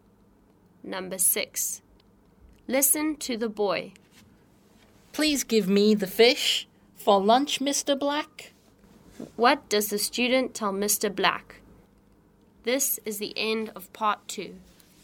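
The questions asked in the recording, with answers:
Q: What does the student tell Mr. Black?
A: To give him the fish for lunch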